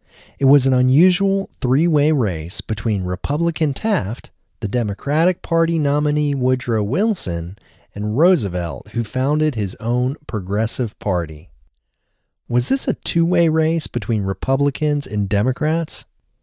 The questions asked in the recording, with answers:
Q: Was this a two-way race between Republicans and Democrats?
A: No, this wasn't a two-way race between Republicans and Democrats.